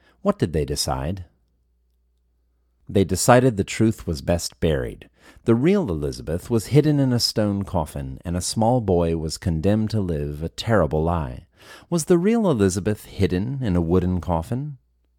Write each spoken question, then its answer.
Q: Was the real Elizabeth hidden in a wooden coffin?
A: No, the real Elizabeth was not hidden in a wooden coffin.